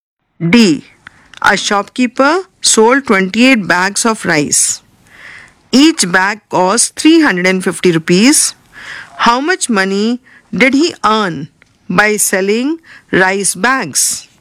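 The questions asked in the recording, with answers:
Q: How much money did he earn by selling rice bags?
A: 9800 rupees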